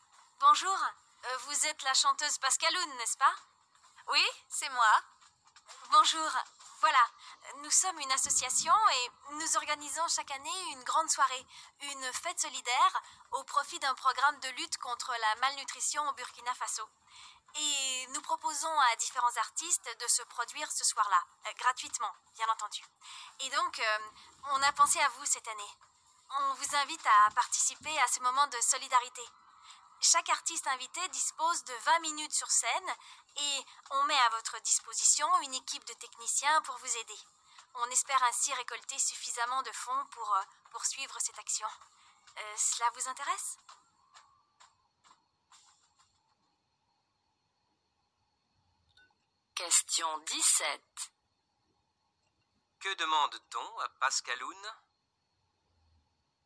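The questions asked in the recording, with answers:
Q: Que demande-t-on à Pascaloun ?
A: De chanter gratuitement lors d'une soirée solidaire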